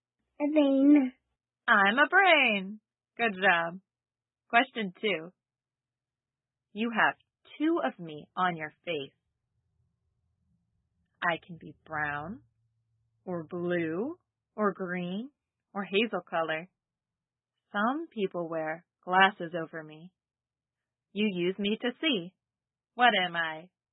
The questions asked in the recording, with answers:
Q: You use me to see. What am I?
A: Eyes.